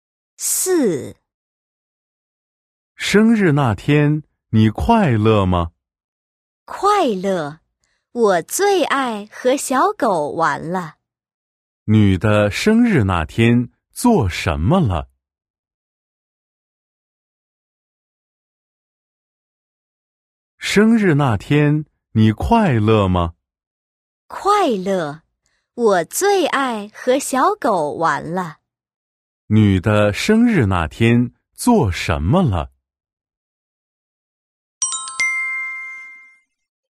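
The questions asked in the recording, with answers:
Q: 女的生日那天,做什么了?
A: 和小狗玩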